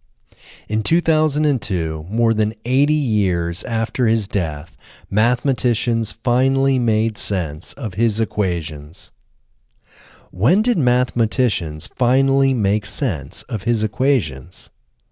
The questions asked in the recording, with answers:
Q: When did mathematicians finally make sense of his equations?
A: Mathematicians finally made sense of his equations in 2002.